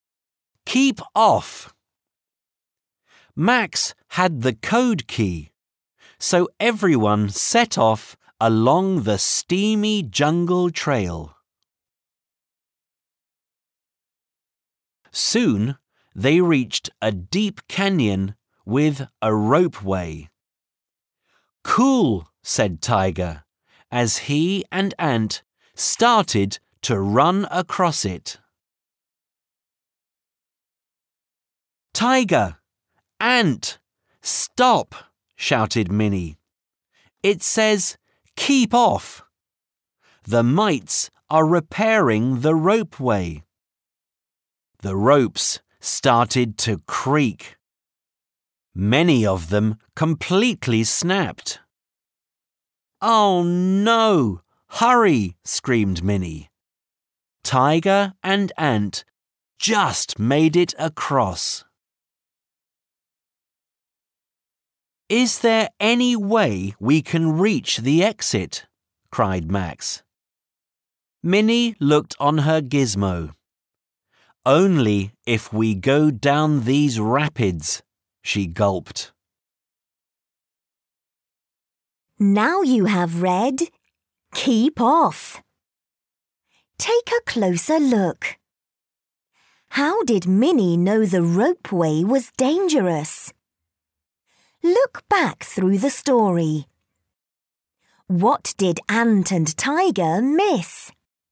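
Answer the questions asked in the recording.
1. She read the sign that said keep off because the mites were repairing it
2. The keep off sign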